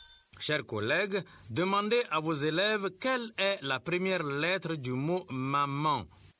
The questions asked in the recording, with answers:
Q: Chers collègues, demandez à vos élèves quelle est la première lettre du mot « maman ».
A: C'est M.